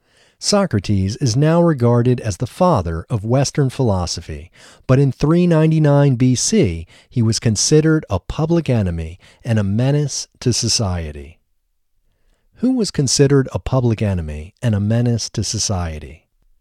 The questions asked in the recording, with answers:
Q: Who was considered a public enemy and a menace to society?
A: Socrates was considered a public enemy and a menace to society.